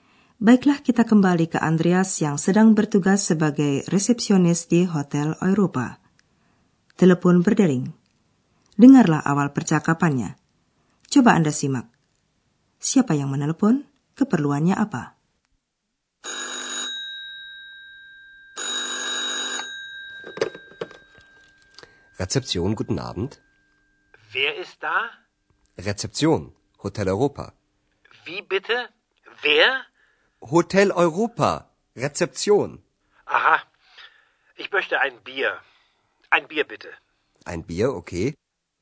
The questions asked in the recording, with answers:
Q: Keperluannya apa?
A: Penelepon ingin memesan bir.